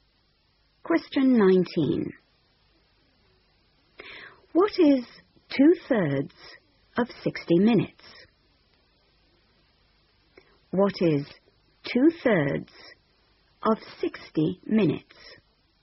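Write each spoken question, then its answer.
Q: What is 2/3 of 60 minutes?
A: 40 minutes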